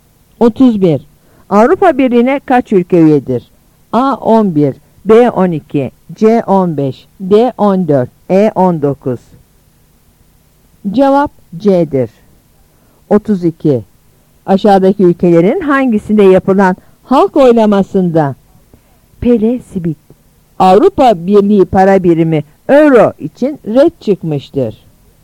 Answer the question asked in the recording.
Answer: Cevap C'dir.